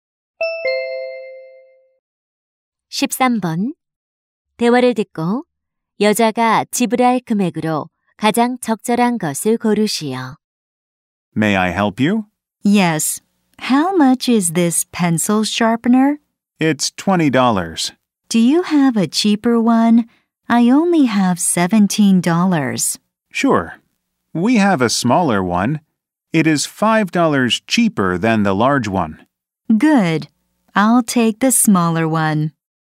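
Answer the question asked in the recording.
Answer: $15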